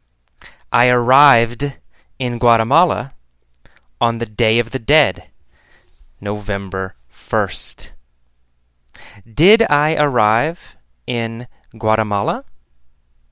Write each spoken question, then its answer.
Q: Did I arrive in Guatemala?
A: Yes, I arrived in Guatemala.